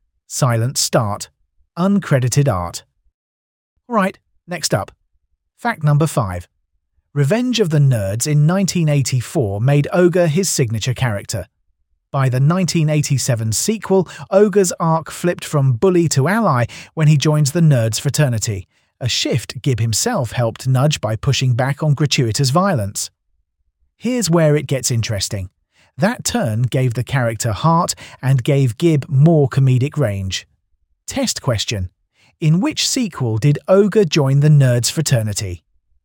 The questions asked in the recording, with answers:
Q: In which sequel did Ogre join the Nerds fraternity?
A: Correct answer. Revenge of the Nerds, Sarah Sounder.